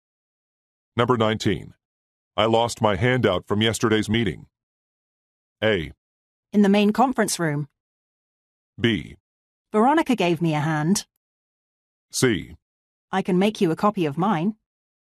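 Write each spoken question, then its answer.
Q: I lost my handout from yesterday's meeting.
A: C: I can make you a copy of mine.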